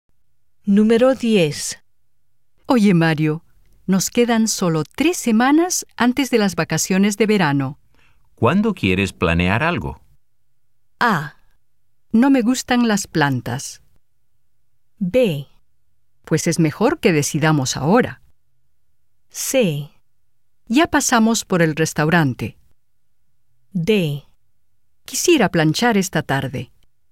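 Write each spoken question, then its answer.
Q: ¿Cuándo quieres planear algo?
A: B: Pues es mejor que decidamos ahora.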